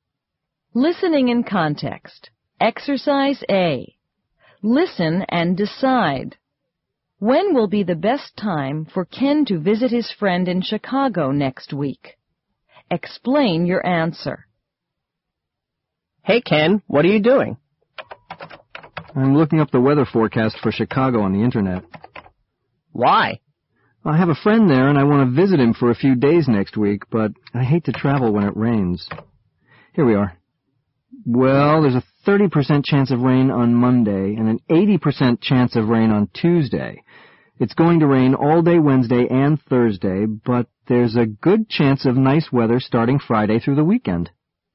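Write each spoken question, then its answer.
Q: When will be the best time for Ken to visit his friend in Chicago next week?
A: Friday through the weekend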